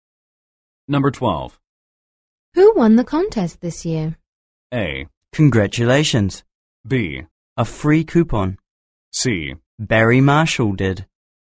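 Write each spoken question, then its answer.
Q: Who won the contest this year?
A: C: Barry Marshall did.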